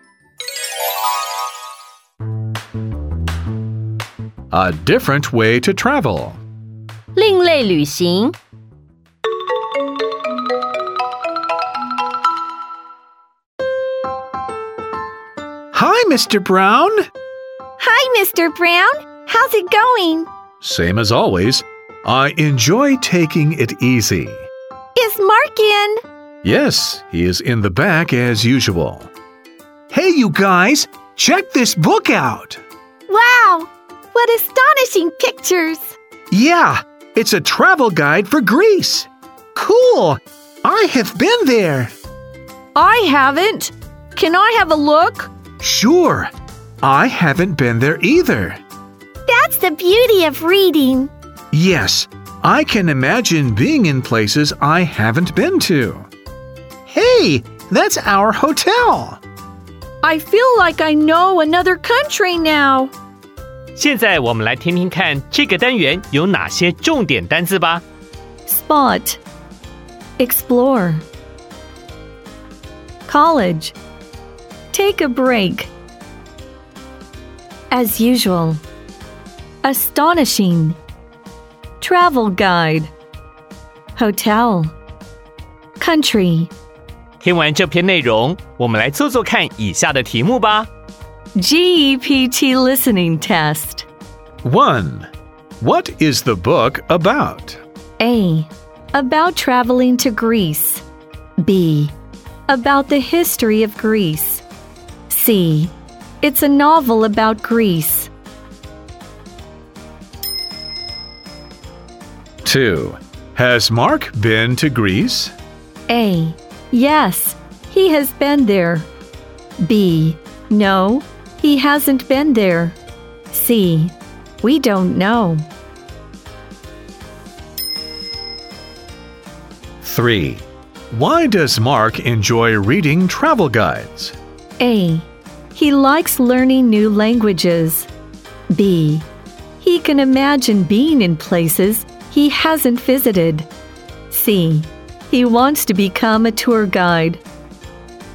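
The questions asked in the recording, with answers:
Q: What is the book about?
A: A: About traveling to Greece.

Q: Why does Mark enjoy reading travel guides?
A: B: He can imagine being in places he hasn't visited.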